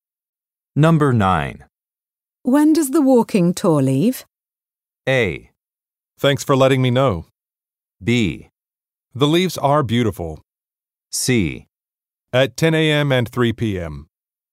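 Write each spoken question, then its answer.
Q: When does the walking tour leave?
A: C: At 10 a.m. and 3 p.m.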